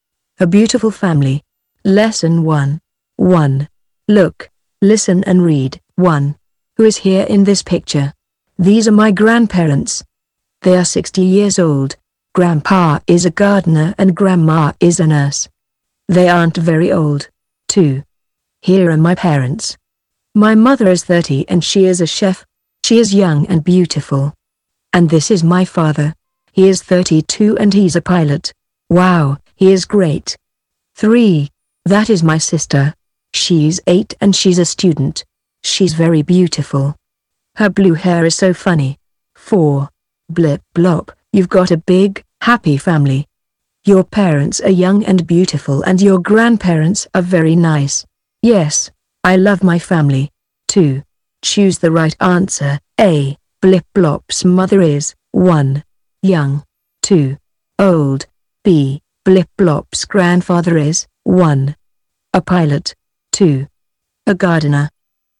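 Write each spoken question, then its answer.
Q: Blip blop's mother is 1.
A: 1: Young

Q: Blip blop's grandfather is 1.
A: 2: A gardener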